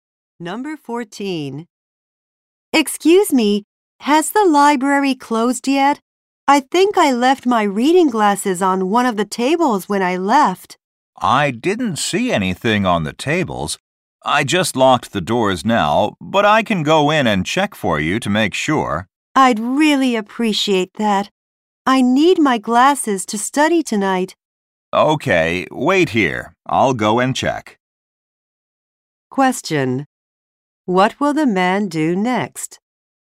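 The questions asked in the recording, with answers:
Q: What will the man do next?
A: Check the library for her glasses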